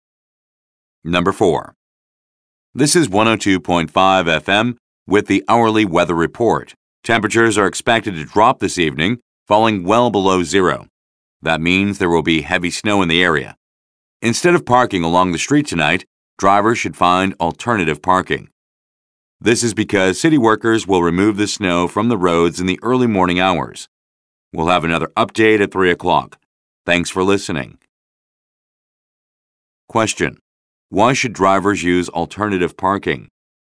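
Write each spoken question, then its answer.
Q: Why should drivers use alternative parking?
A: Because city workers will remove the snow from the roads in the early morning.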